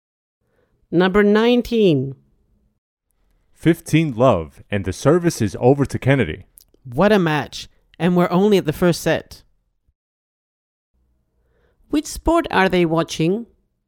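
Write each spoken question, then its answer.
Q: Which sport are they watching?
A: tennis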